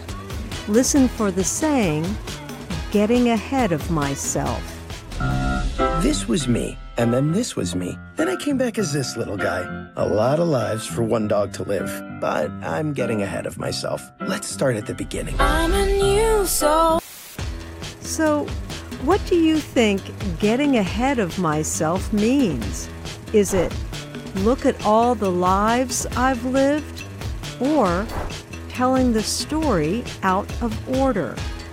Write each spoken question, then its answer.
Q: So, what do you think getting ahead of myself means?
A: Getting ahead of myself means telling the story out of order.